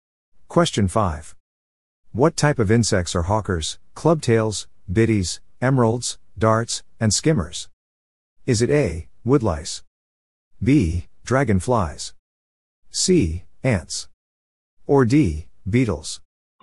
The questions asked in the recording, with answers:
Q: What type of insects are hawkers, clubtails, biddies, emeralds, darts, and skimmers?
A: The answer is B. Dragonflies.